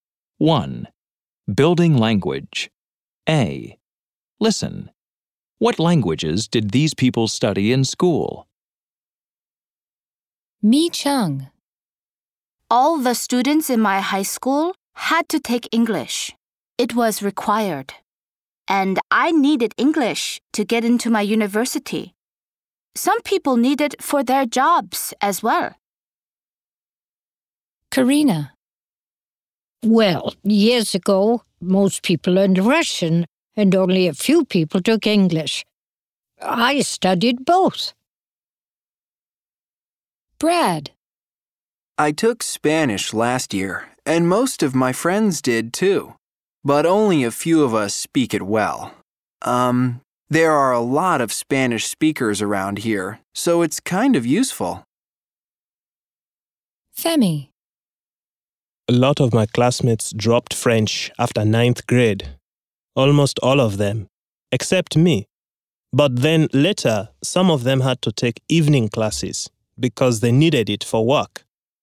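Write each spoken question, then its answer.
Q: What languages did these people study in school?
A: Mi Cheng: English; Karina: Russian and English; Brad: Spanish; Femi: French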